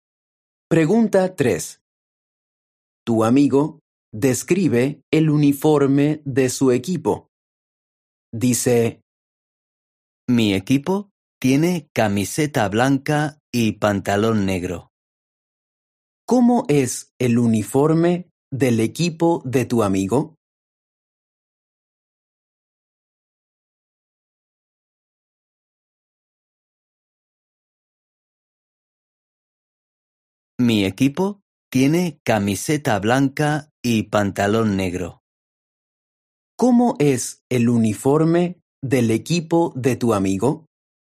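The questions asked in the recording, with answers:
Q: ¿Cómo es el uniforme del equipo de tu amigo?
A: Camiseta blanca y pantalón negro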